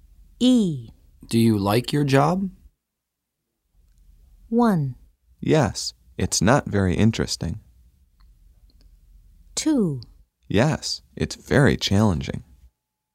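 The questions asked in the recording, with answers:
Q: Do you like your job?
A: 2: Yes, it's very challenging.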